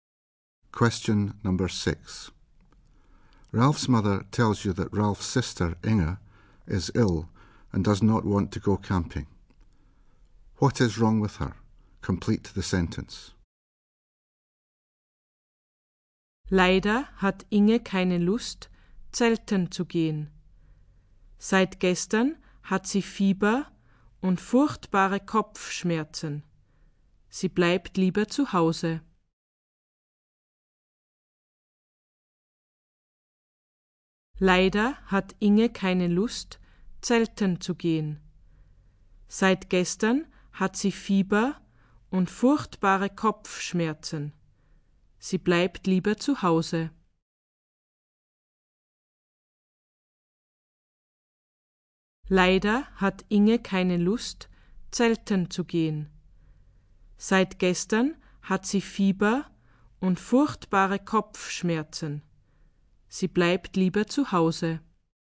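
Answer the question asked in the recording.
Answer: She has a temperature and a terrible headache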